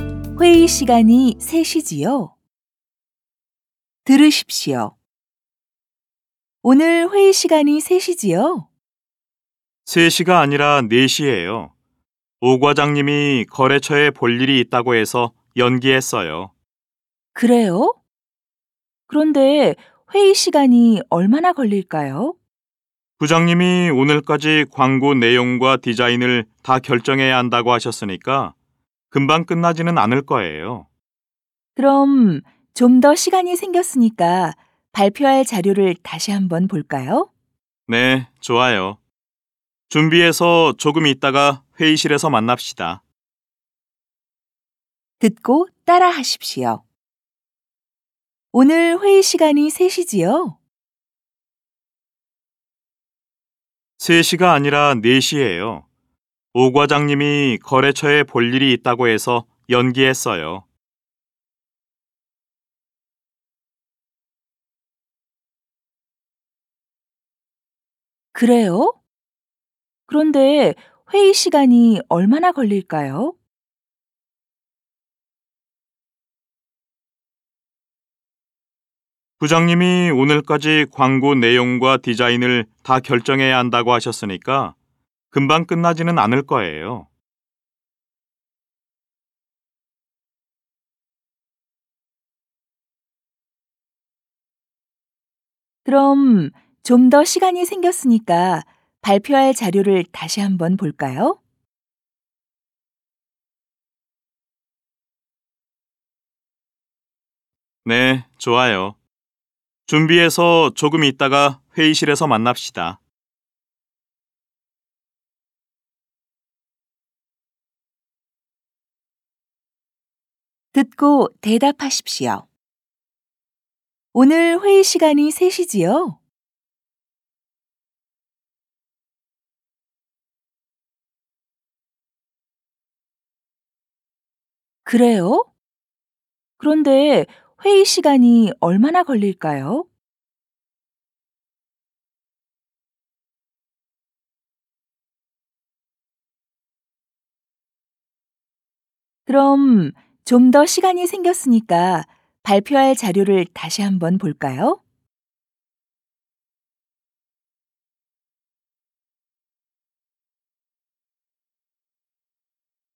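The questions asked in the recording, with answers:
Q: 오늘 회의 시간이 3시지요?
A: 3시가 아니라 4시예요.

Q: 그래요? 그런데 회의 시간이 얼마나 걸릴까요?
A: 광고 내용과 디자인을 다 결정해야 해서 금방 끝나지는 않을 거예요.

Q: 그럼 좀 더 시간이 생겼으니까 발표할 자료를 다시 한번 볼까요?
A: 네, 좋아요. 준비해서 조금 있다가 회의실에서 만납시다.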